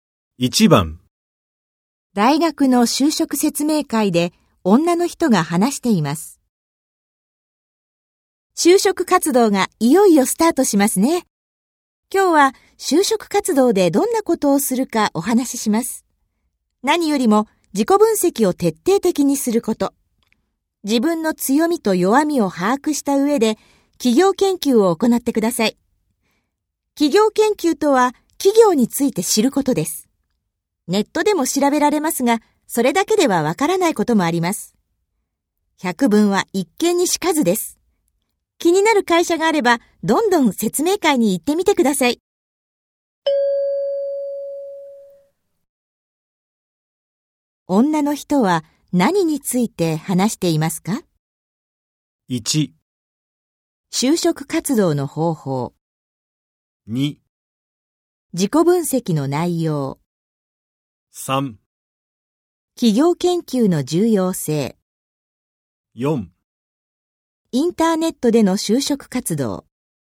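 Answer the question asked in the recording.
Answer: 1: 就職活動の方法。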